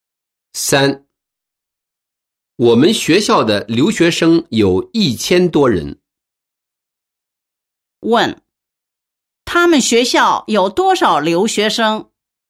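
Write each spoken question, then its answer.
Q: 他们学校有多少留学生?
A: 1000多人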